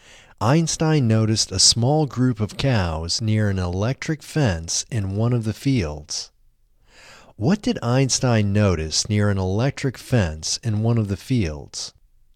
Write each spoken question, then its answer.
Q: What did Einstein notice near an electric fence in one of the fields?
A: Einstein noticed a small group of cows near an electric fence in one of the fields.